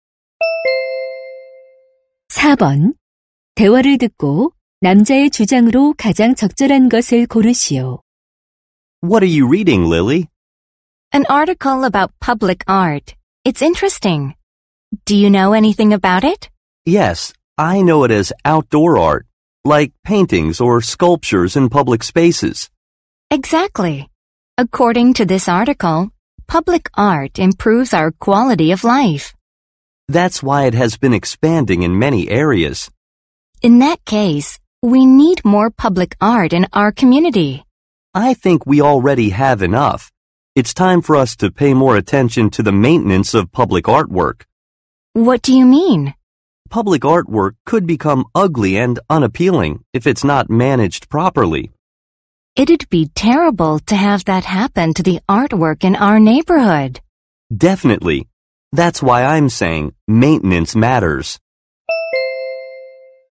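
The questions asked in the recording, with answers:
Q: 대화를 듣고 남자의 주장으로 가장 적절한 것을 고르시오.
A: 공공 예술 작품의 관리(유지 보수)에 더 관심을 기울여야 한다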